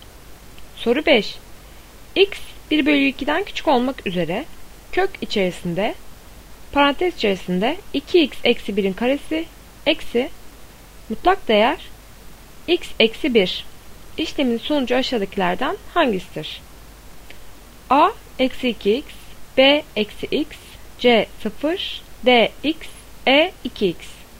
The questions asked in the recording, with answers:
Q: İşlemin sonucu aşağıdakilerden hangisidir?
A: Doğru cevap B eksi x.